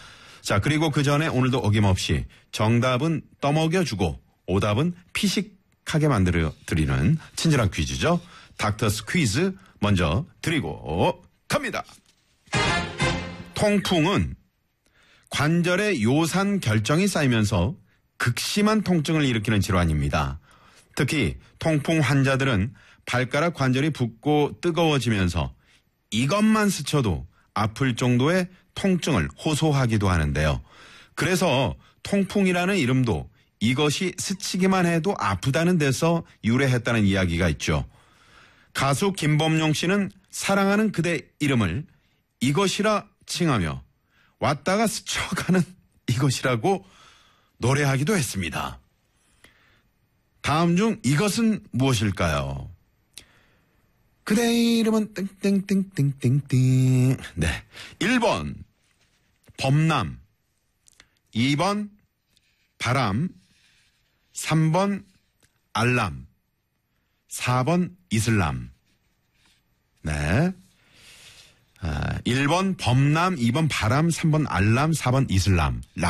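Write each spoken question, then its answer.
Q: 다음 중 이것은 무엇일까요?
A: 2: 바람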